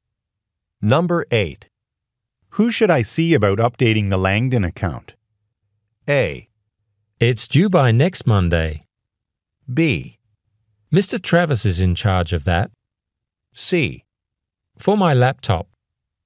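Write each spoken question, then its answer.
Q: Who should I see about updating the Langdon account?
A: B: Mr. Travis is in charge of that.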